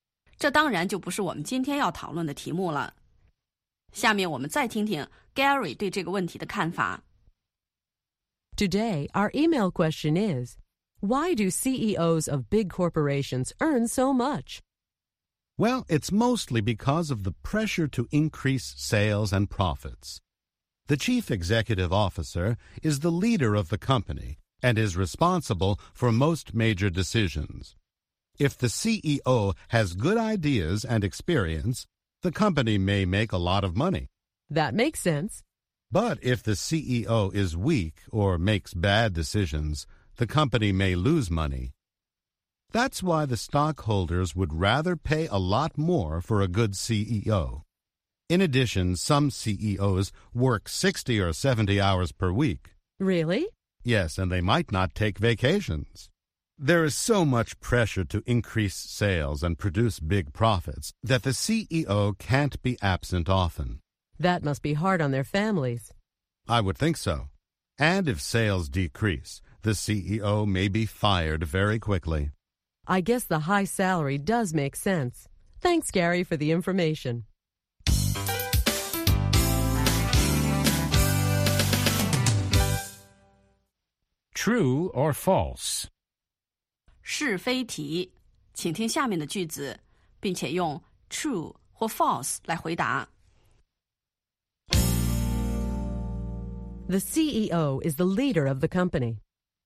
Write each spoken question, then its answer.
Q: The CEO is the leader of the company.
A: True. The chief executive officer is responsible for most major decisions.